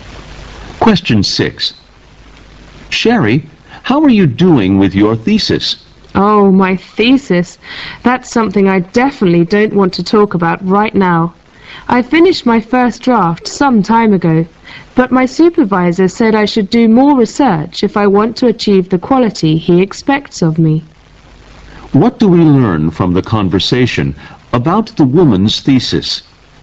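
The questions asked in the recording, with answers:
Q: What do we learn from the conversation about the woman's thesis?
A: Her supervisor wasn't satisfied with her first draft, so she needs to do more research.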